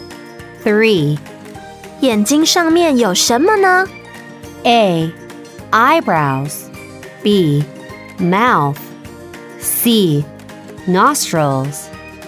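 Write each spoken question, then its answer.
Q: 眼睛上面有什么呢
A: A: Eyebrows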